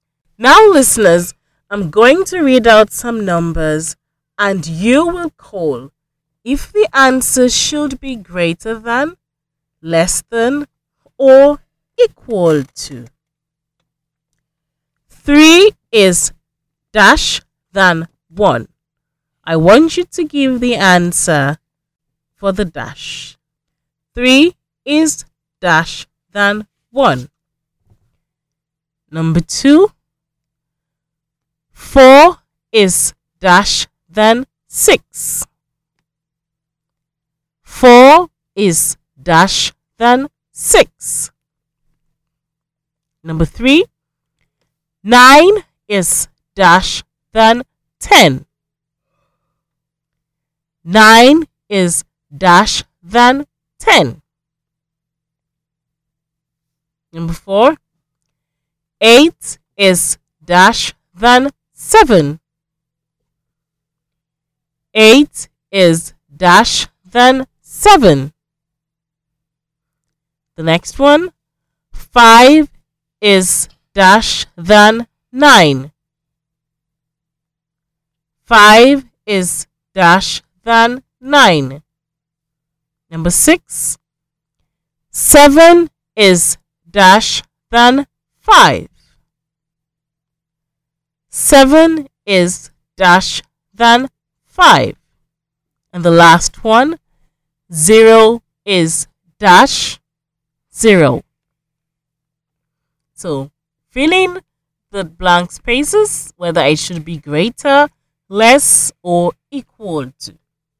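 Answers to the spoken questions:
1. greater
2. less
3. less
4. greater
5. less
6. greater
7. equal to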